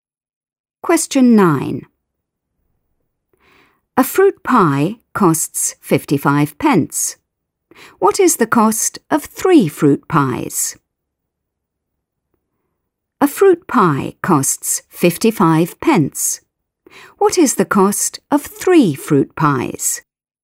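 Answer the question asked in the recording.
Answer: £1.65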